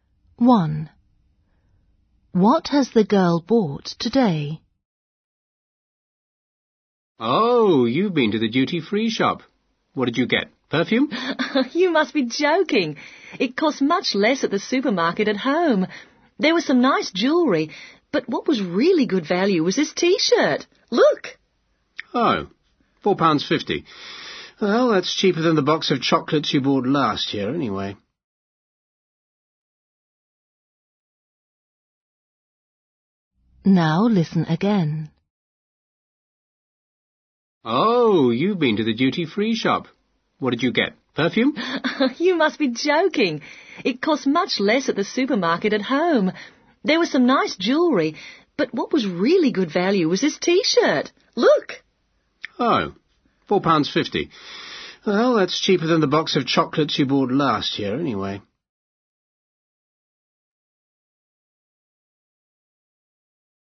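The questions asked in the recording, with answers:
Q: What has the girl bought today?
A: a T-shirt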